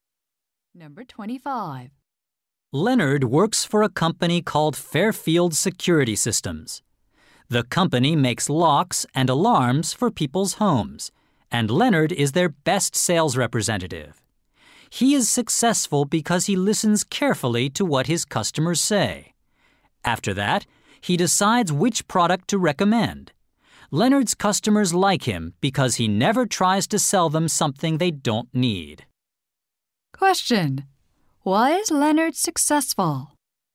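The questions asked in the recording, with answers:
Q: Why is Leonard successful?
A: He listens carefully to his customers.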